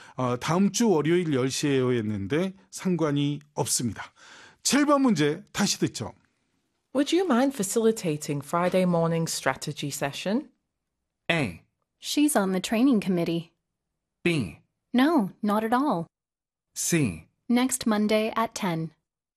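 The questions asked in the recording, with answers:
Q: Would you mind facilitating Friday morning strategy session?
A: B: No, not at all.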